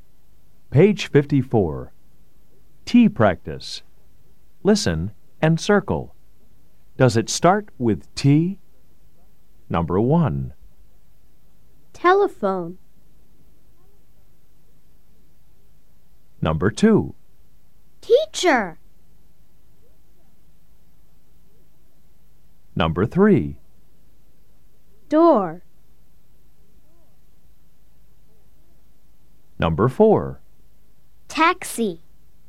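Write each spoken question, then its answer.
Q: Does it start with T?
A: Yes

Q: Does it start with T?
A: Yes

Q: Does it start with T?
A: No

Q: Does it start with T?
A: Yes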